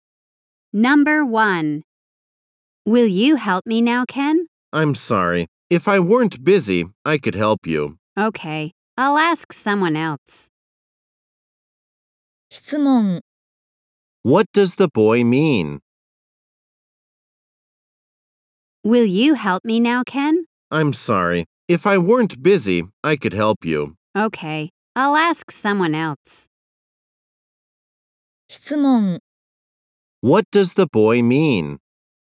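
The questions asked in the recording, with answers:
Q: What does the boy mean?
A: He is busy, so he can't help her now.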